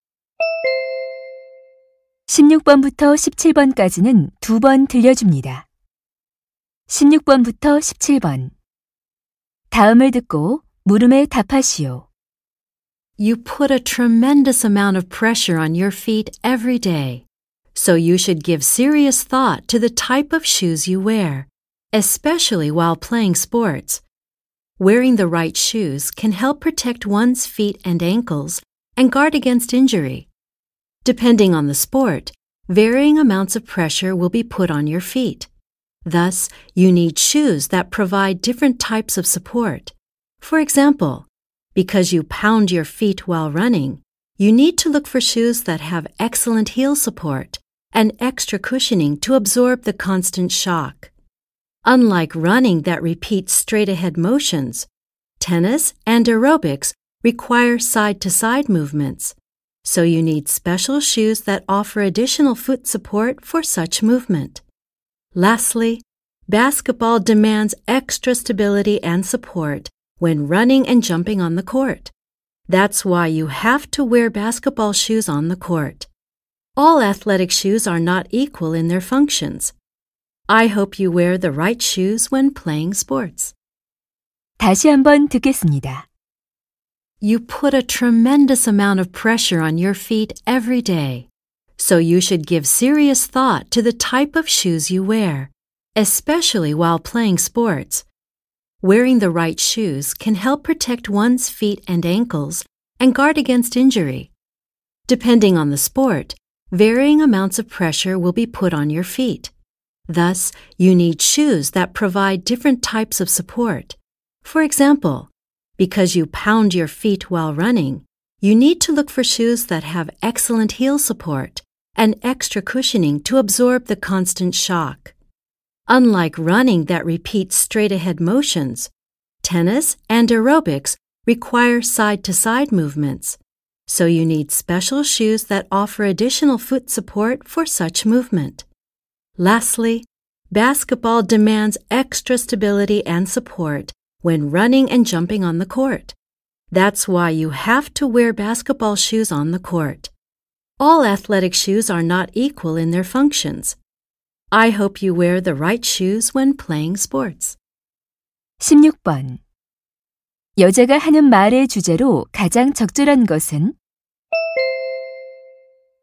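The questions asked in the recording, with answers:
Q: 여자가 하는 말의 주제로 가장 적절한 것은?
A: 운동 종목에 맞는 운동화를 신는 것의 중요성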